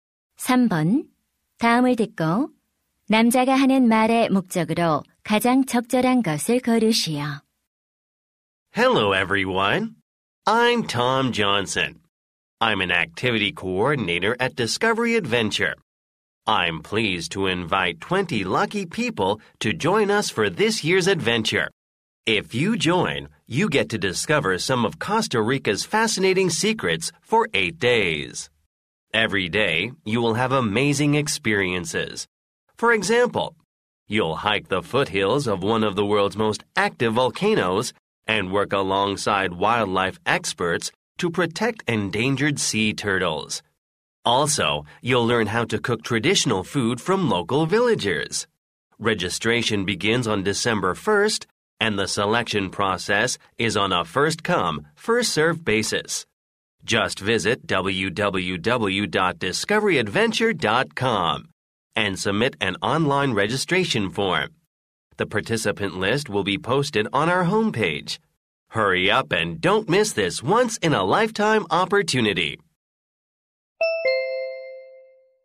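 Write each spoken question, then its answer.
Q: 다음을 듣고 남자가 하는 말의 목적으로 가장 적절한 것을 고르시오.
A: 코스타리카 모험 프로그램 참가자 모집을 안내하려고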